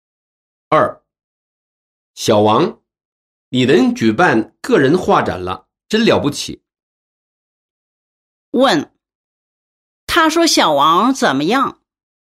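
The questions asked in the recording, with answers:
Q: 问,他说小王怎么样?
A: 真了不起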